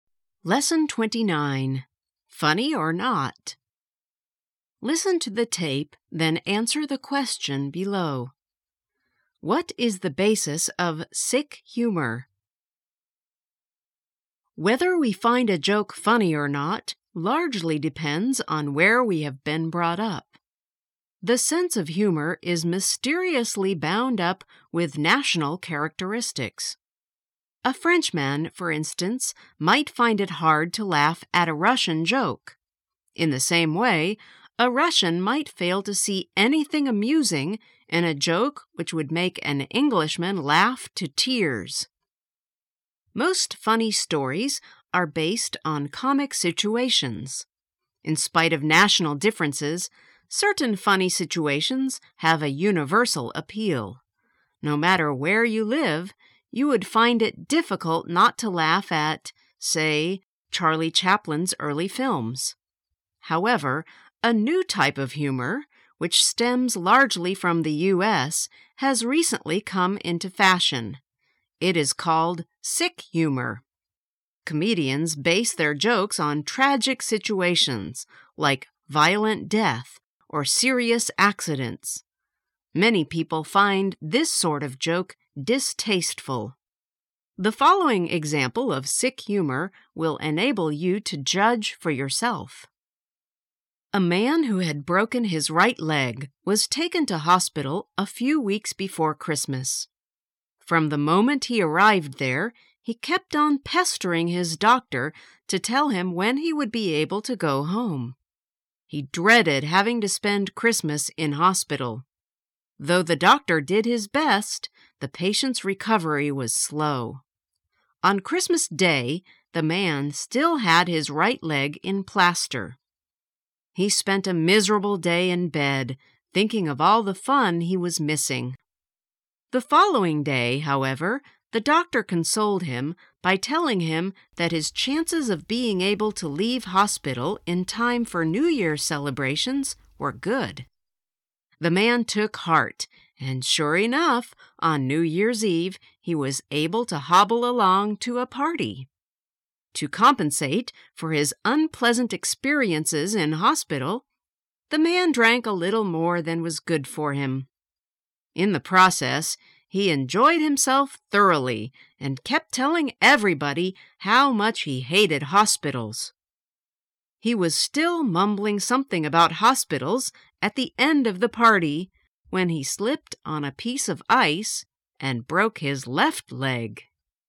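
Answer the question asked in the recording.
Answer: Tragic situations, like violent death or serious accidents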